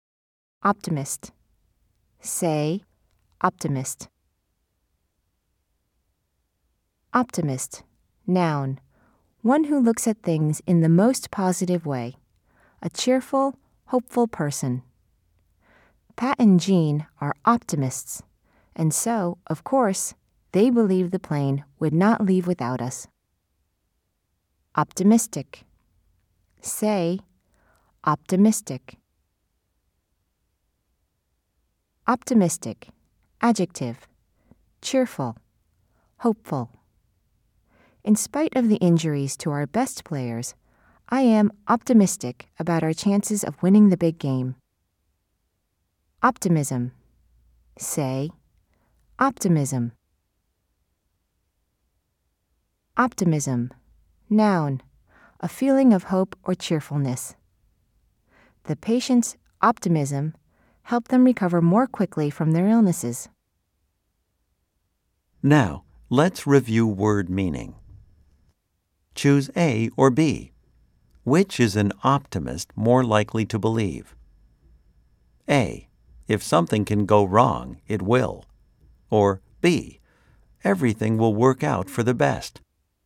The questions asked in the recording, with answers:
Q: Choose A or B. Which is an optimist more likely to believe?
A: If you said B, you are correct.